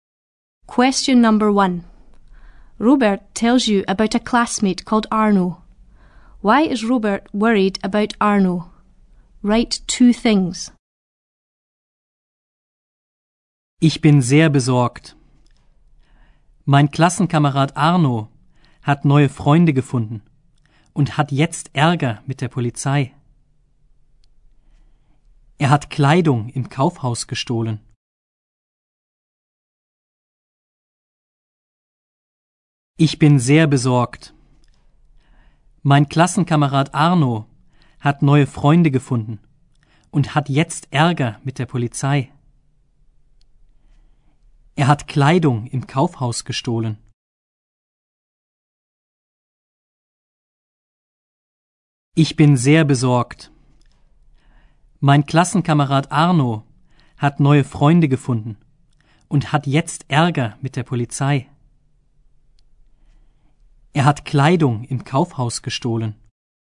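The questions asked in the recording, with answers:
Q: Why is Robert worried about Arno?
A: Arno has new friends and is in trouble with the police; he stole clothes from a department store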